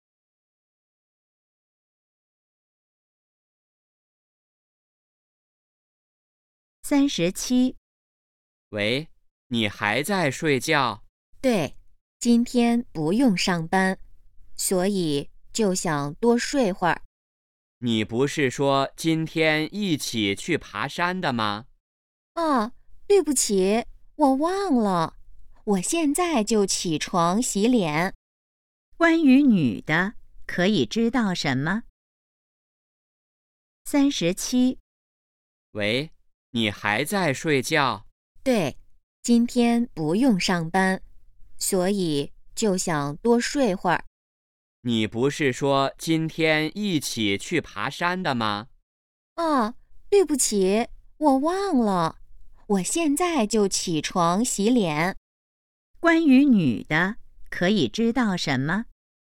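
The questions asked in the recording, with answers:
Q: 关于女的,可以知道什么?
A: 她忘了今天去爬山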